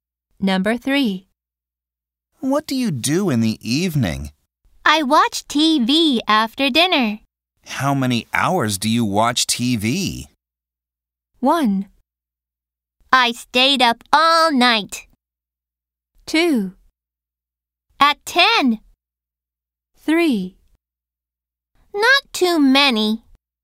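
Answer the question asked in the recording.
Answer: 3: Not too many.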